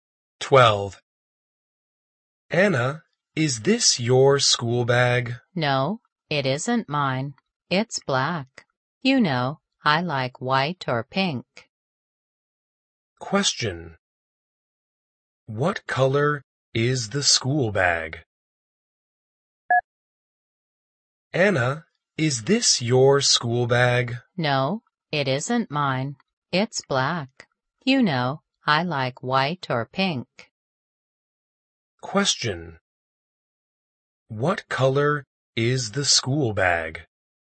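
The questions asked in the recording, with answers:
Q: What color is the school bag?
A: Black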